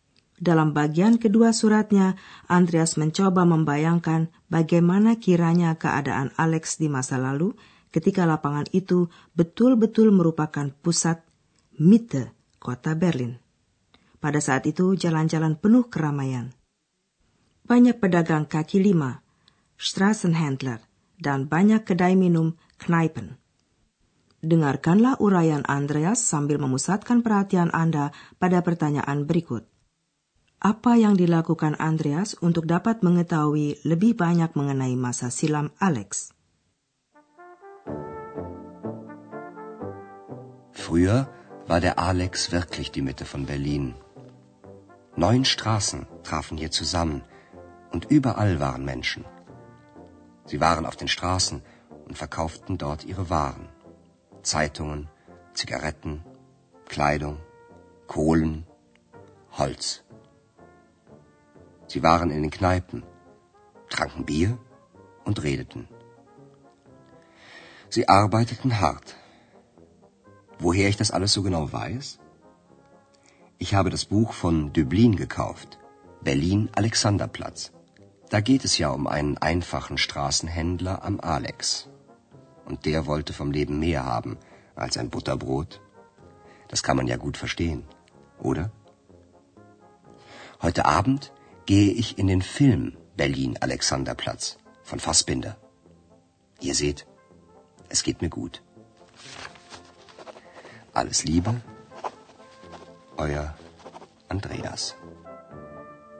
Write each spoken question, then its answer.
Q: Apa yang dilakukan Andreas untuk dapat mengetahui lebih banyak mengenai masa silam Alex?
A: Ya, agar dapat mengetahui lebih banyak tentang kehidupan di sekitar Alexanderplatz pada masa lalu, Andreas membeli buku termasyur karangan Alfred Döblin yang berjudul Berlin Alexanderplatz.